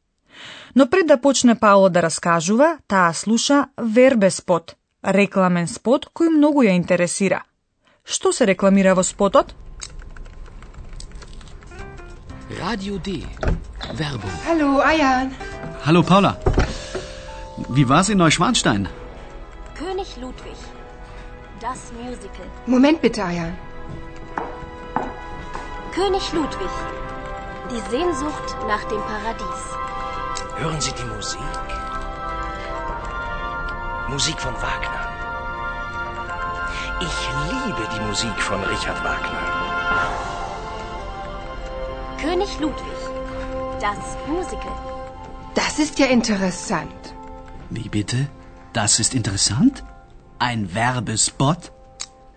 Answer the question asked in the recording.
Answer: Во рекламниот спот се рекламира мюзикл, во кој станува збор за животот и смртта на кралот Лудвиг II.